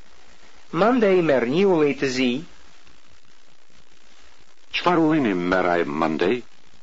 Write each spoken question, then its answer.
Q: Qfar ulejni meraj mandej?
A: Mandej a i merë një ulej të zi.